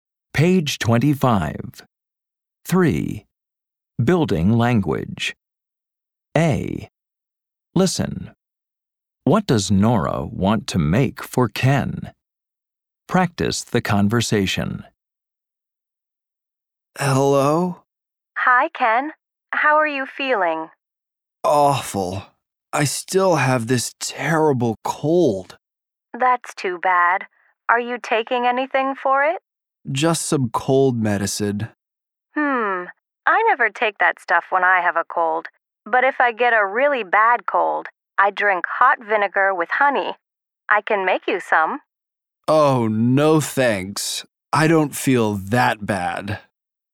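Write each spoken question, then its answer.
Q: What does Nora want to make for Ken?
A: Hot vinegar with honey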